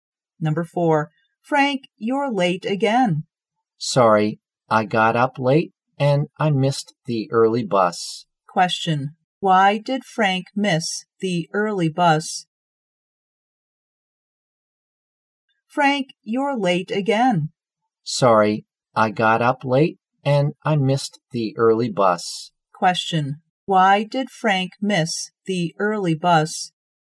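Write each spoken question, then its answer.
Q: why did Frank miss the early bus?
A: He got up late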